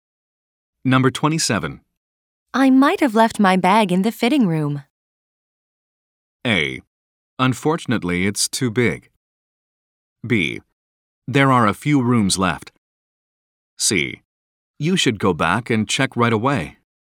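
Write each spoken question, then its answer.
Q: I might have left my bag in the fitting room.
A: C: You should go back and check right away.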